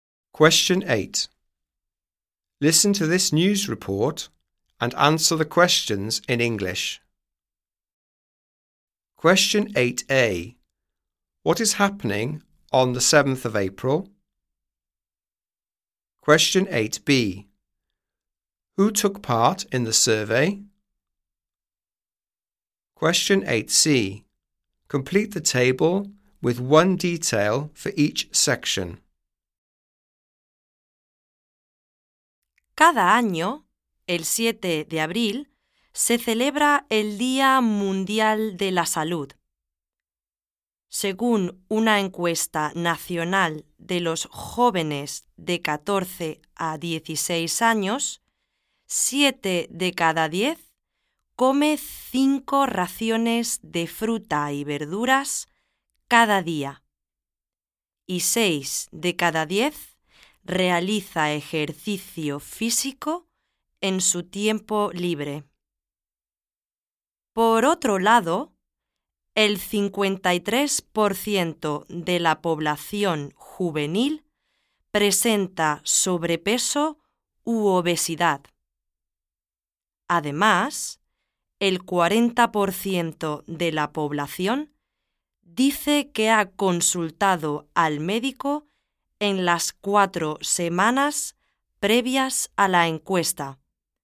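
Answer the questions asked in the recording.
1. World Health Day
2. Young people aged 14 to 16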